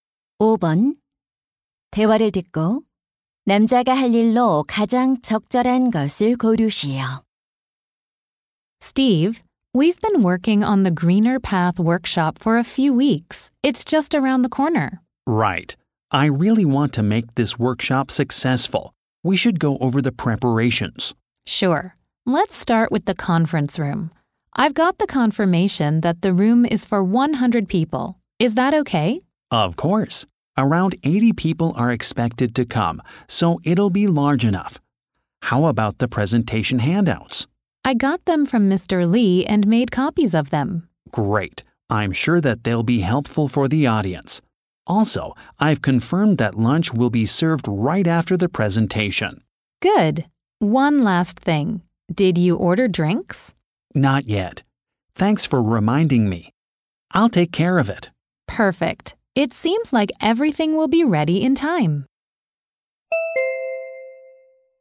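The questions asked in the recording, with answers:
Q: 대화를 듣고 남자가 할 일로 가장 적절한 것을 고르시오.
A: 음료 주문하기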